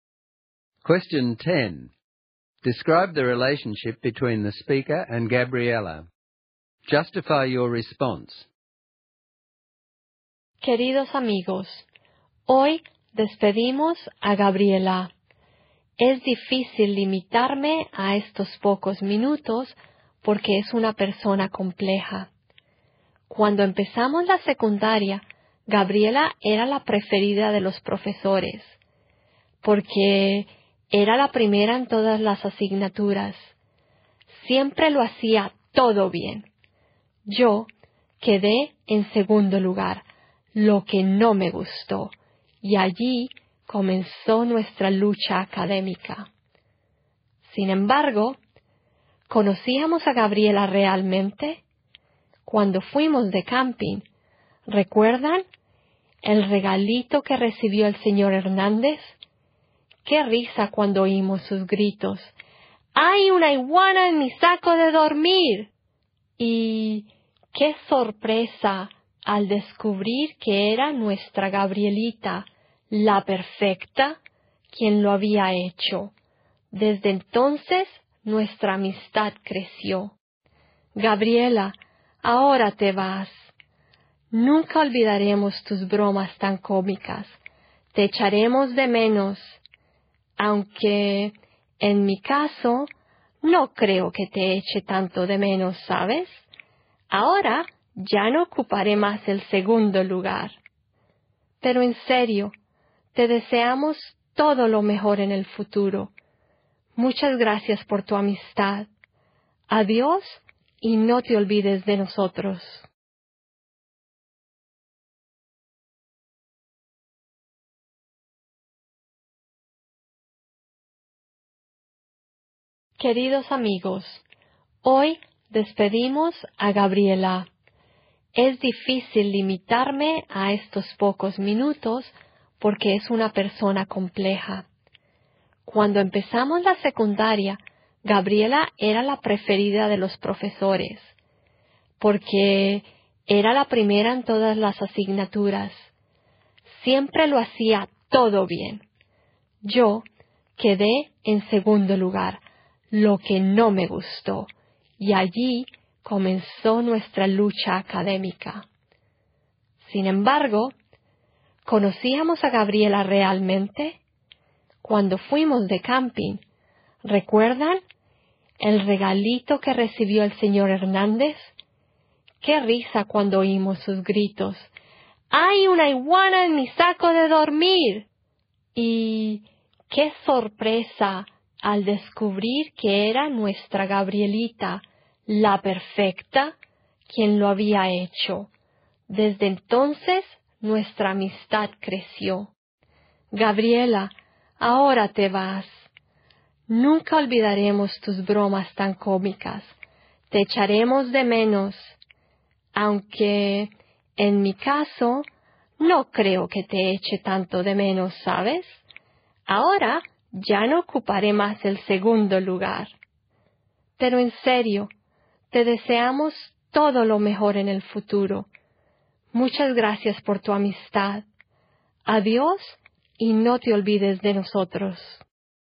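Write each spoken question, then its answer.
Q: Describe the relationship between the speaker and Gabriella.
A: They began as academic rivals (she was always first, the speaker second) and became friends after her iguana prank on the camping trip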